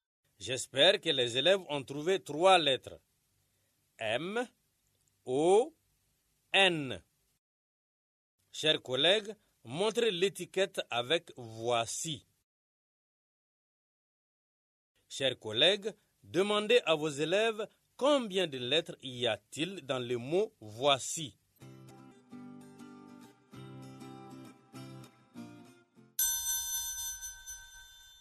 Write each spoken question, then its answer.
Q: Chers collègues, demandez à vos élèves combien de lettres y a-t-il dans le mot « voici ».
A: J'espère que les élèves ont trouvé cinq lettres.